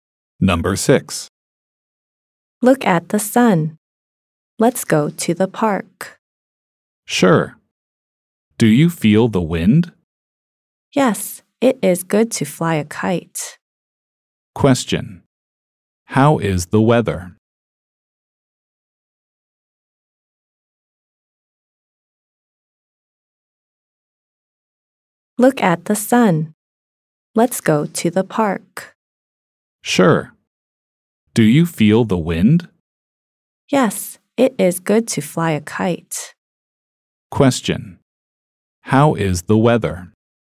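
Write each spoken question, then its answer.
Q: How is the weather?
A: It is sunny and windy.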